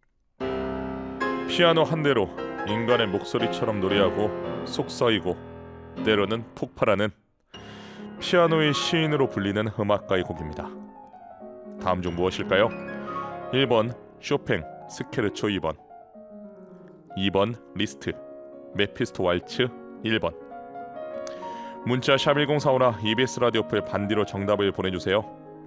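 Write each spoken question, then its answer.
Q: 다음 중 무엇일까요? 1번 쇼팽 스케르초 2번 2번 리스트 메피스토 왈츠 1번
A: 1: 쇼팽 스케르초 2번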